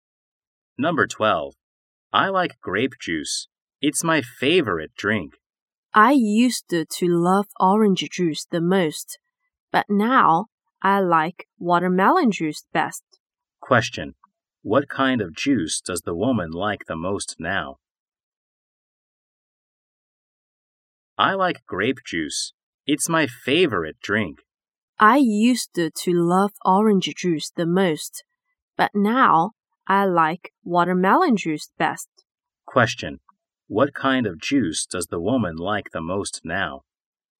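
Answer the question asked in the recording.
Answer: Watermelon juice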